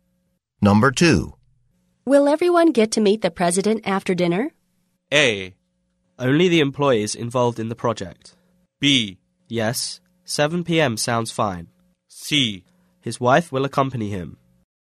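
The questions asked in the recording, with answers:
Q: Will everyone get to meet the president after dinner?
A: A: Only the employees involved in the project.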